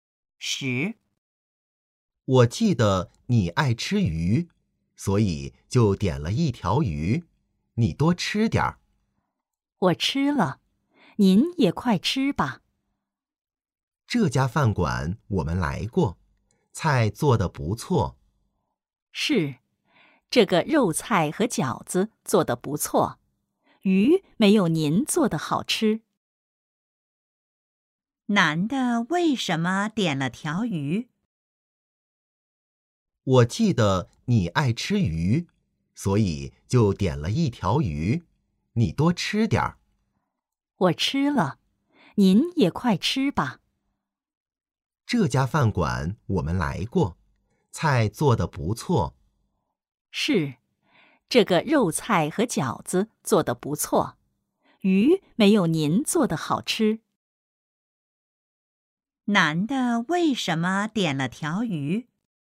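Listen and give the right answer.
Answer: 因为女的爱吃鱼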